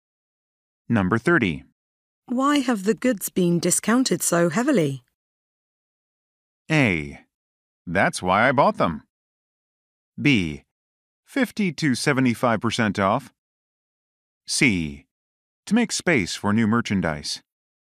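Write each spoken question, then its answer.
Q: Why have the goods been discounted so heavily?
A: C: To make space for new merchandise.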